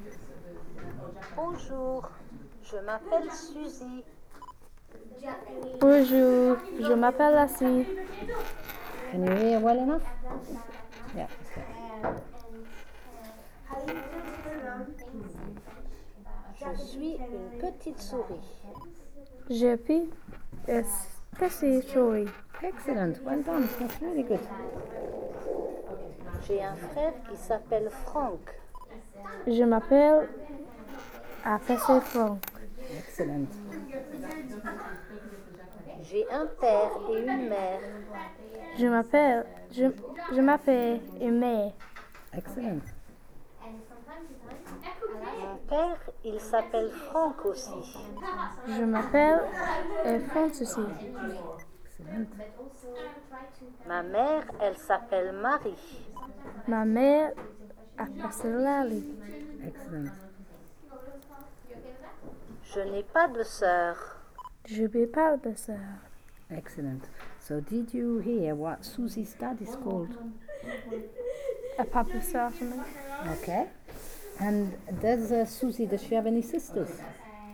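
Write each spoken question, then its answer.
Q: So did you hear what Susie's dad is called?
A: Franck

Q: And does Susie, does she have any sisters?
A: No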